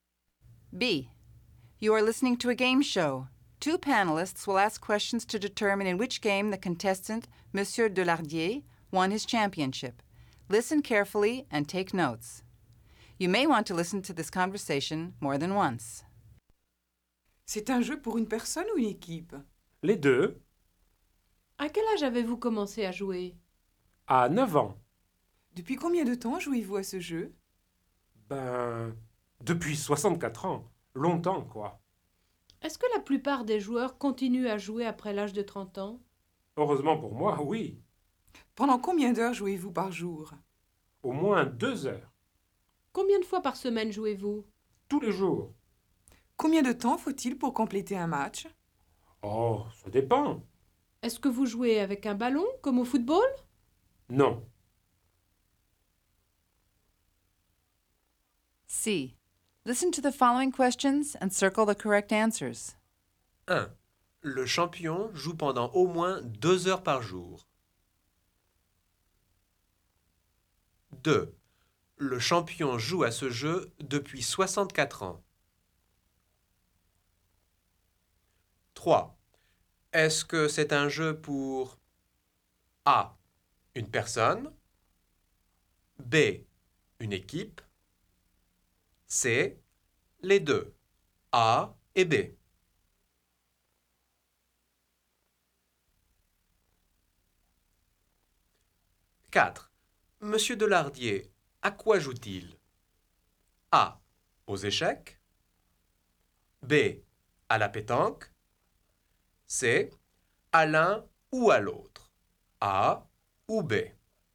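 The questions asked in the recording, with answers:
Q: Est-ce que c'est un jeu pour A. Une personne, B. Une équipe, C. Les deux, A et B.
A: C: Les deux, A et B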